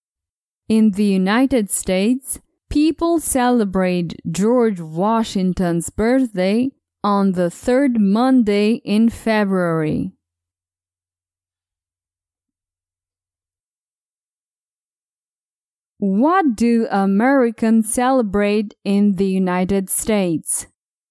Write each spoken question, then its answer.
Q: What do Americans celebrate in the United States?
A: Americans celebrate Washington's birthday.